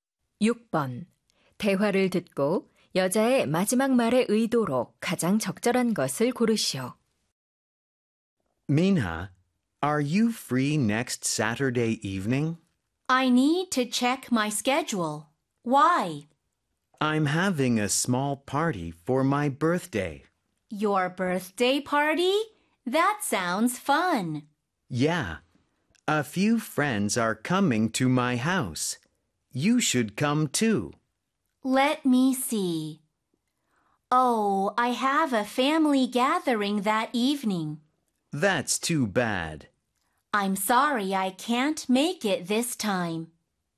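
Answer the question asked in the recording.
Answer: 초대 거절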